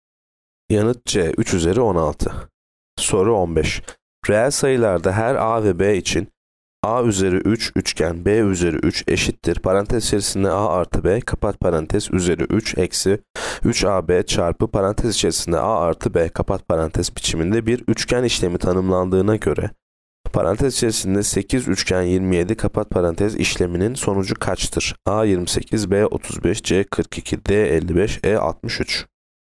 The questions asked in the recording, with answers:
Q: Parantez içerisinde A artı B kapat parantez üzeri 3 eksi 3AB çarpı parantez içerisinde A artı B kapat parantez biçiminde bir üçgen işlemi tanımlandığına göre parantez içerisinde 8 üçgen 27 kapat parantez işleminin sonucu kaçtır?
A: Yanıt B 35.